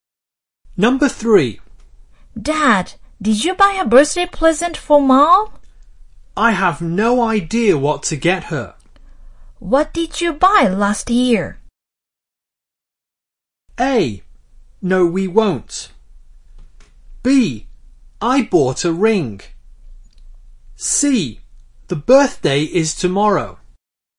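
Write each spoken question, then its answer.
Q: What did you buy last year?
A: B: I bought a ring.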